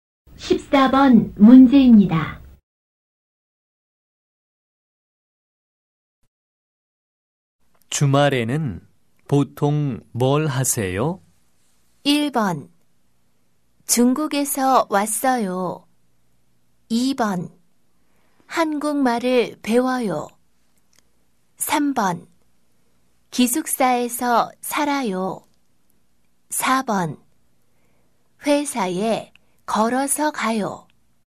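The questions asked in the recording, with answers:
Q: 주말에는 보통 뭘 하세요?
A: 2: 한국말을 배워요.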